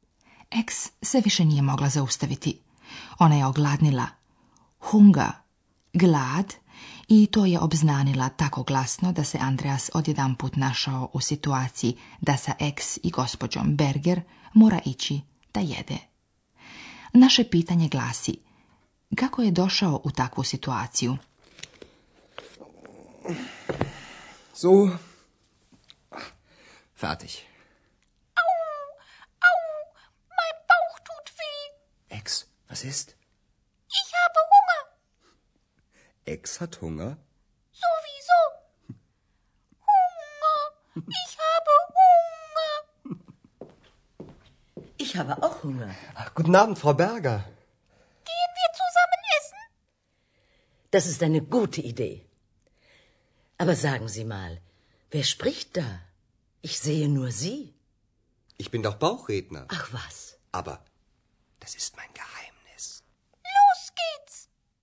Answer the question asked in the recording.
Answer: Ex je glasno izjavila da je gladna.